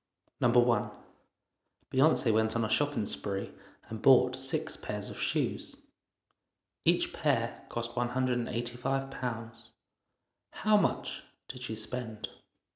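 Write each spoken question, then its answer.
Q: Each pair cost £185. How much did she spend?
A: £1,110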